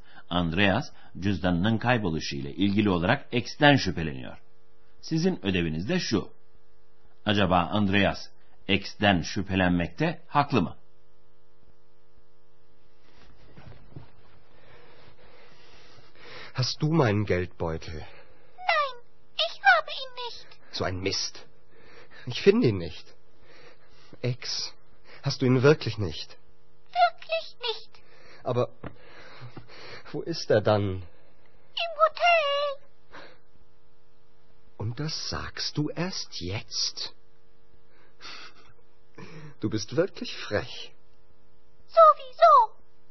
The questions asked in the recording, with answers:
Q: Acaba Andreas X'ten şüphelenmekte haklı mı?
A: Evet doğru. Andreas'ın cüzdanı X'te değil.